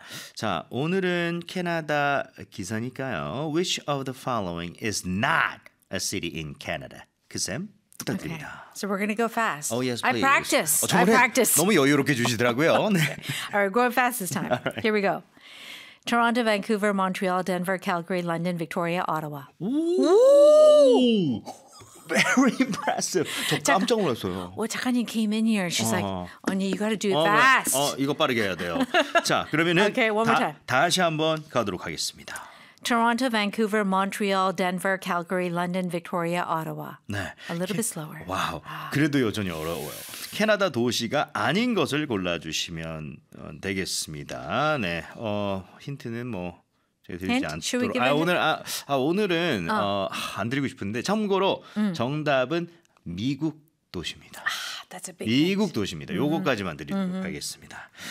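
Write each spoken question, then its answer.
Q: Which of the following is not a city in Canada?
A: Denver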